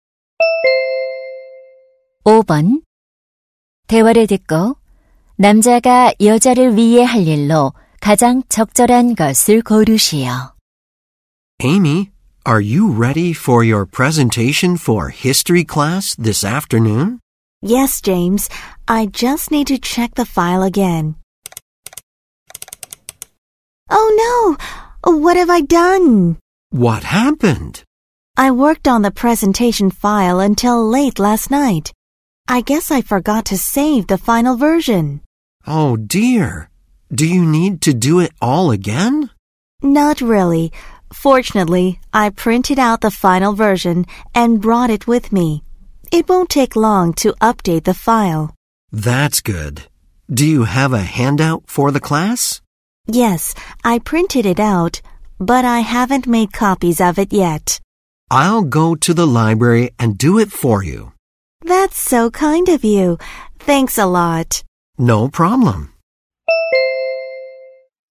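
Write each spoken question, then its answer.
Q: 대화를 듣고 남자가 여자를 위해 할 일로 가장 적절한 것을 고르시오.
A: 유인물 복사하기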